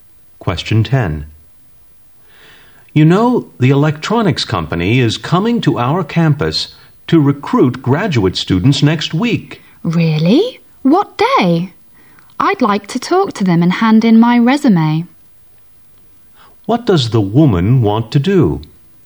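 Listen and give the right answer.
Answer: Talk to the company recruiters and hand in her resume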